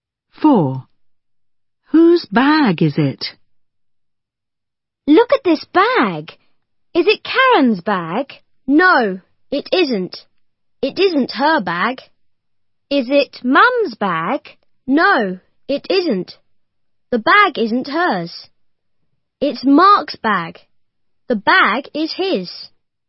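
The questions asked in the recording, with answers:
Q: Whose bag is it?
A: Mark's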